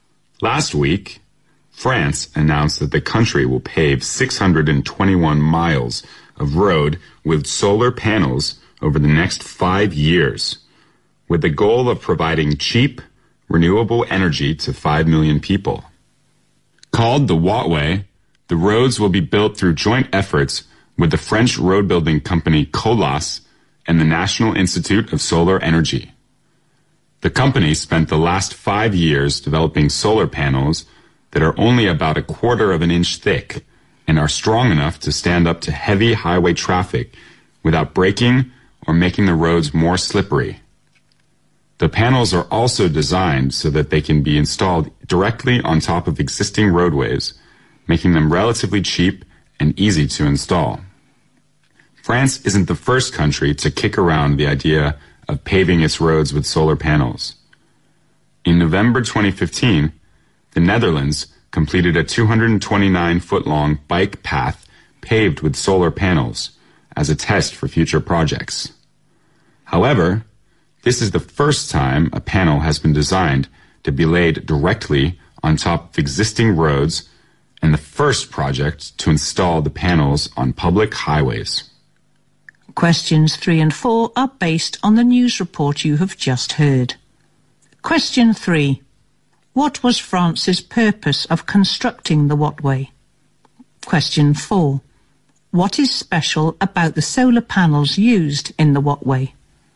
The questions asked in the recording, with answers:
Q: What was France's purpose of constructing the Watway?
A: The purpose for France to build this road is to provide cheap renewable energy to 5 million people

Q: What is special about the solar panels used in the Watway?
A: Particularly speaking, it should be 1/4 inch thick.